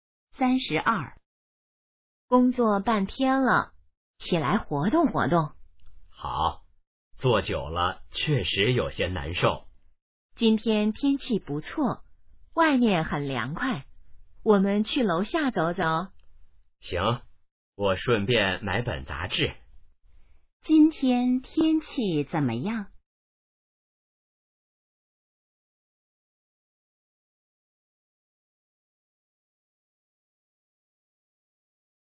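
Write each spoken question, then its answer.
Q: 今天天气怎么样?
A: 不错,很凉快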